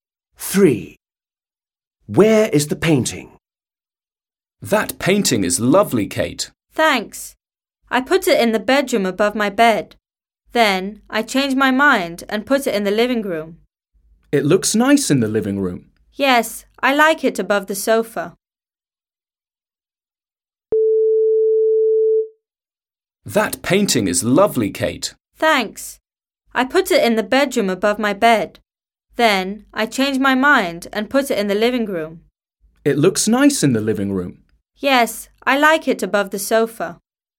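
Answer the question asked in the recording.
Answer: in the living room, above the sofa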